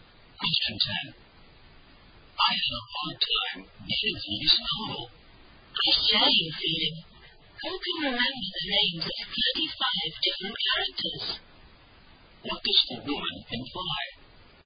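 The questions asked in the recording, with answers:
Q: What does the woman imply?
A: She also found the novel hard to get through because it had too many characters.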